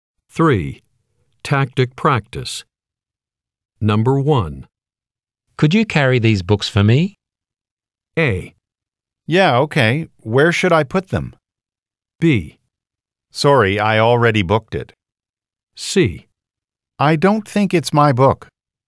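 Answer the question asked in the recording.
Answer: A: Yeah, okay. Where should I put them?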